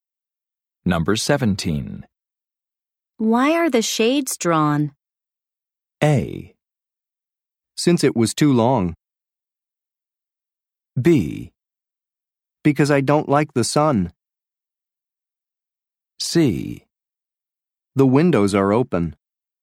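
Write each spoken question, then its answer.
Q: Why are the shades drawn?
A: B: Because I don't like the sun.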